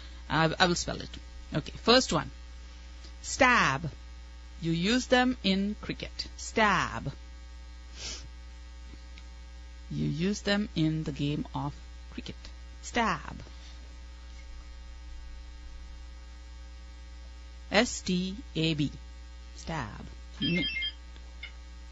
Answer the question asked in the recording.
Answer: Bats, of course.